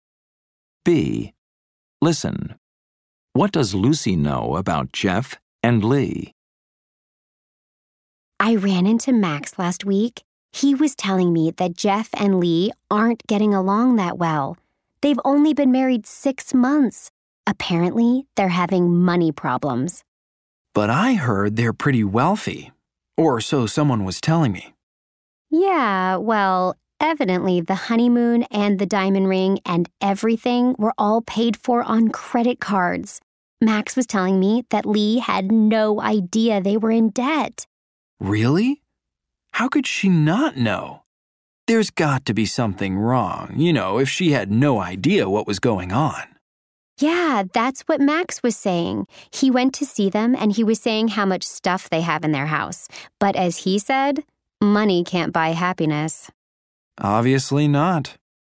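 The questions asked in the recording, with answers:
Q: What does Lucy know about Jeff and Lee?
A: They aren't getting along well and have money problems: their honeymoon and ring were paid for on credit cards, and Lee didn't know they were in debt.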